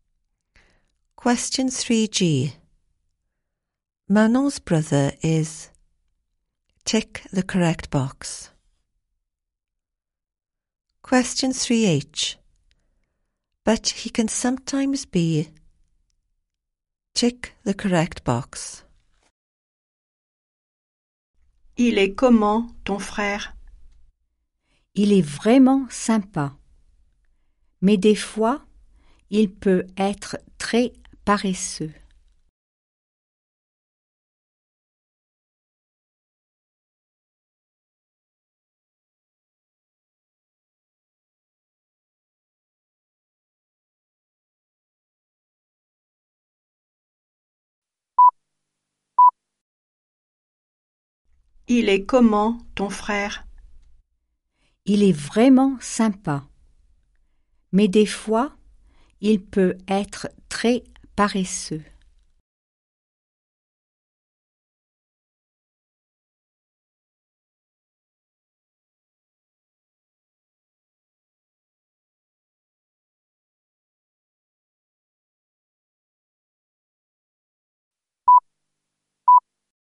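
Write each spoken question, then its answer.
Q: Manon's brother is...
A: really nice

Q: But he can sometimes be...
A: very lazy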